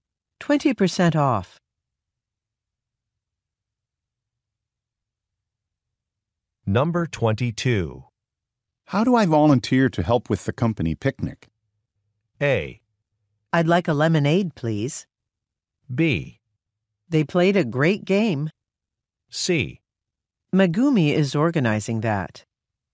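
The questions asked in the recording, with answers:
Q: How do I volunteer to help with the company picnic?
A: C: Megumi is organizing that.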